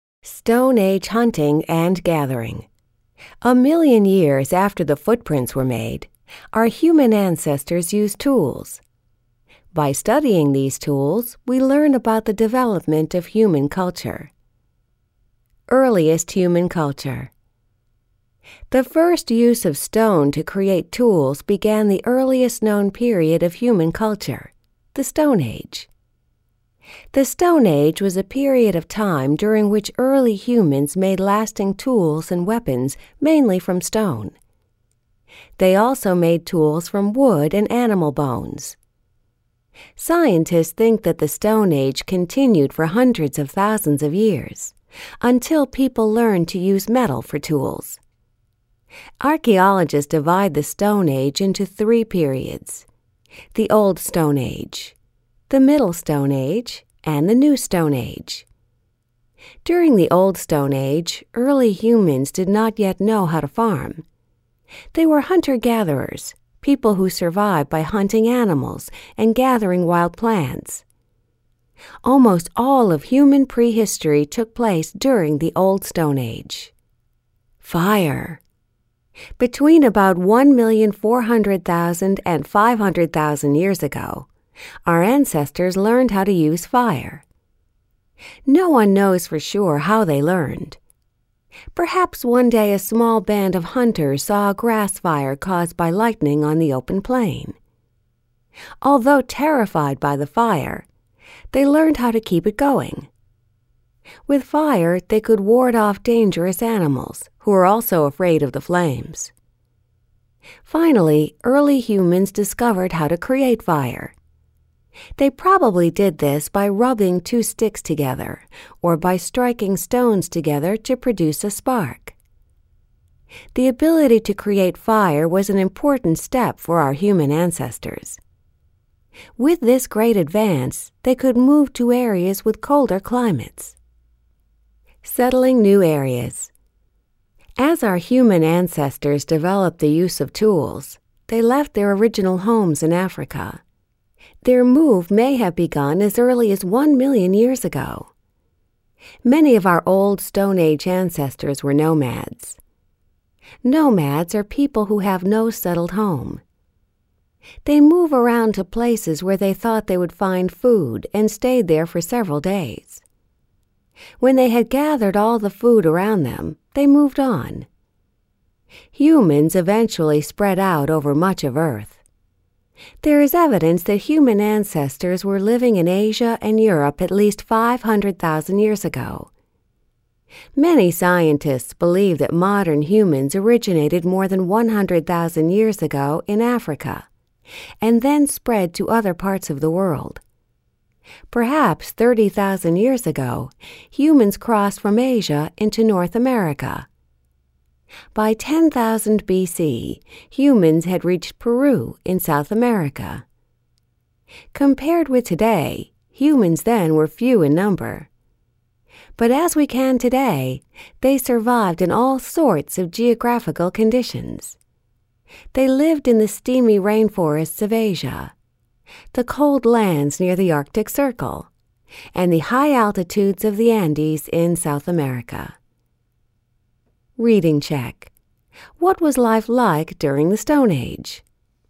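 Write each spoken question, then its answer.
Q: What was life like during the Stone Age?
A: People were nomadic hunter-gatherers who made tools from stone, wood and bone, used fire, and moved around to find food.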